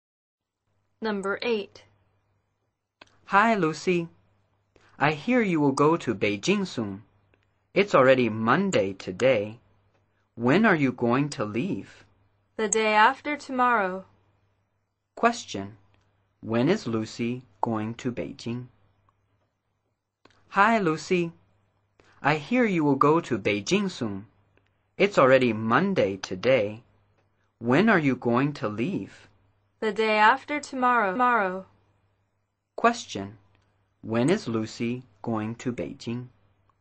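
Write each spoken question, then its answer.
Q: Question. When is Lucy going to Beijing?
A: On Wednesday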